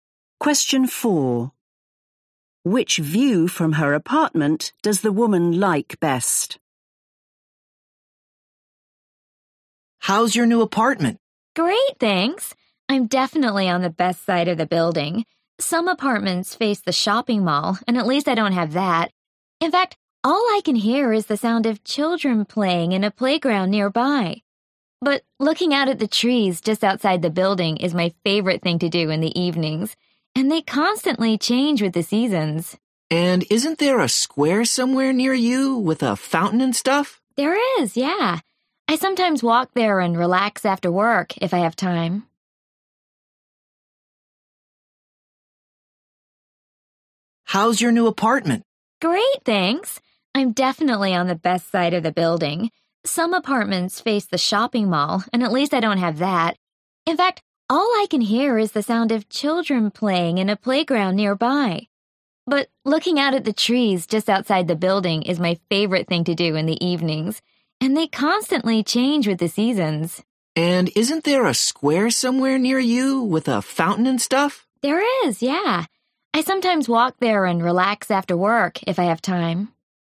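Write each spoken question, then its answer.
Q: Which view from her apartment does the woman like best?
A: the trees outside the building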